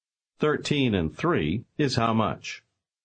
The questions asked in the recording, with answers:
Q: 13 and 3 is how much?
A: 16.